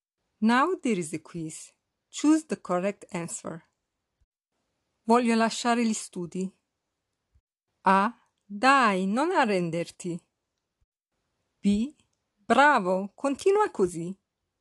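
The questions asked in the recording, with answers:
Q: Voglio lasciare gli studi.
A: A: Dai, non arrenderti.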